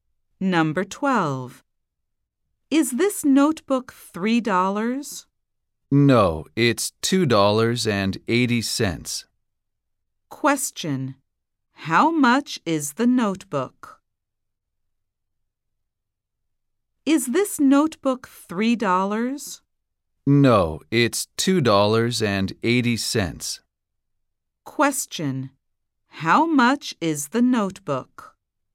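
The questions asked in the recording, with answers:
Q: How much is the notebook?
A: $2.80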